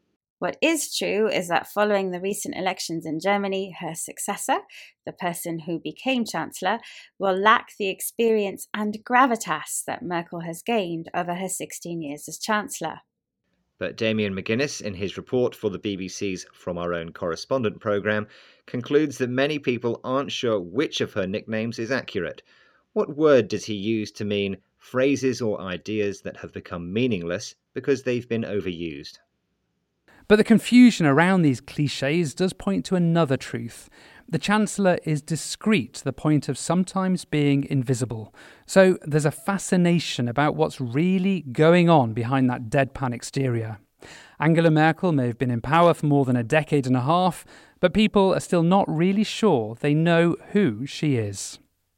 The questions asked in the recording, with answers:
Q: What word does he use to mean phrases or ideas that have become meaningless because they've been overused?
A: He used the word clichés to mean phrases or ideas that have become meaningless because they've been overused.